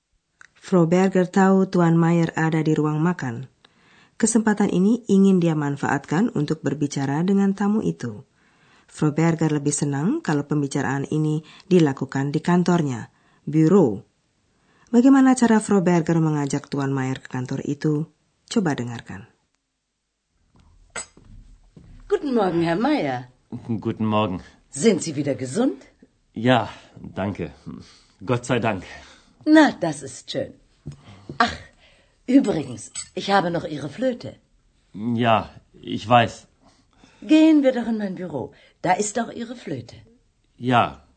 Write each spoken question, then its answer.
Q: Bagaimana cara Frau Berger mengajak Tuan Mayer ke kantor itu?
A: Dengan alasan mau mengembalikan seruling, Tuan Mayer bisa diajak ke kantor karena disitulah serulingnya disimpan.